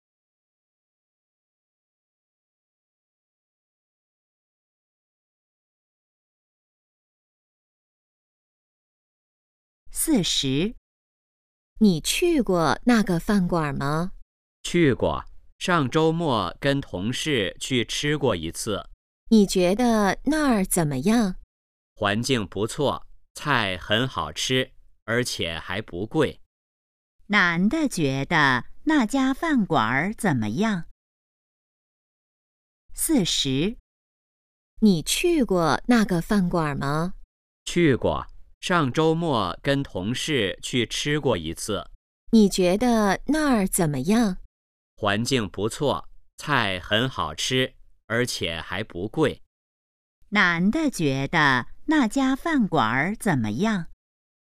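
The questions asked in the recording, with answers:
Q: 男的觉得那家饭馆怎么样?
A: 环境不错,菜好吃,还不贵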